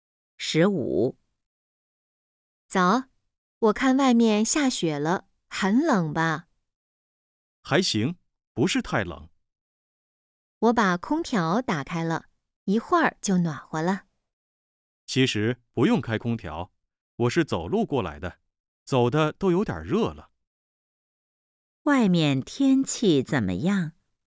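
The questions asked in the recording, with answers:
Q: 外面天气怎么样?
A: 下雪了,不太冷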